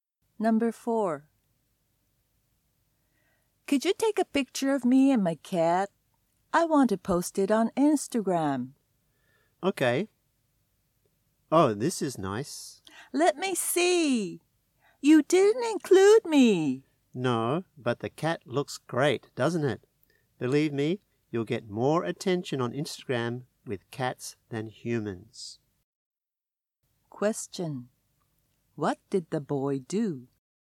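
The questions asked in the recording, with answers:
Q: What did the boy do?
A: He took a picture of only the cat and left the girl out.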